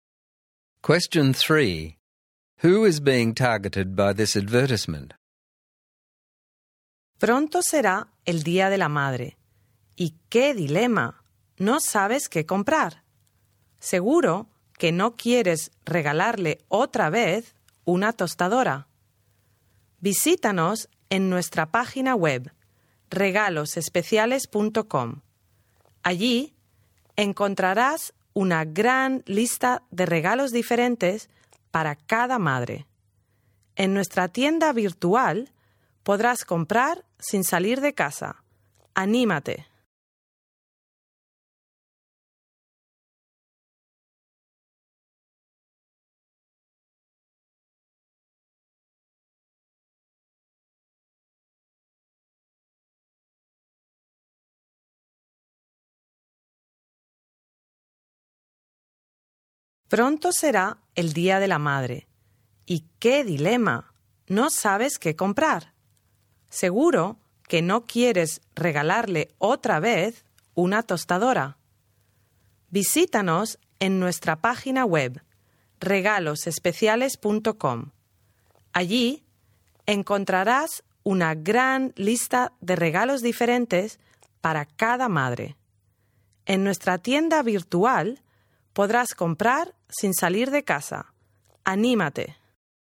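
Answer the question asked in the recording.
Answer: People, such as children, who are looking for a Mother's Day gift and don't know what to buy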